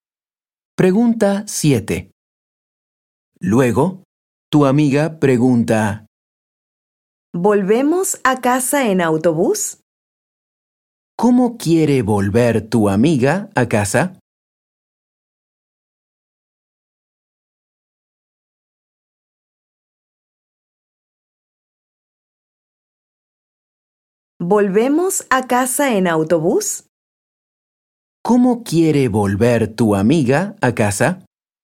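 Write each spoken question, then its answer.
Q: ¿Cómo quiere volver tu amiga a casa?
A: en autobús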